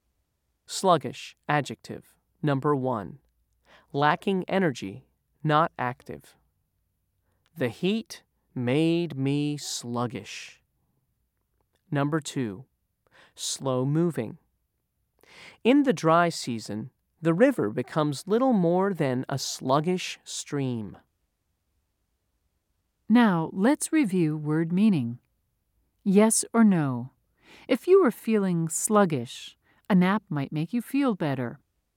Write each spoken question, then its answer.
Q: Yes or no? If you were feeling sluggish, a nap might make you feel better.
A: If you said yes, you're right.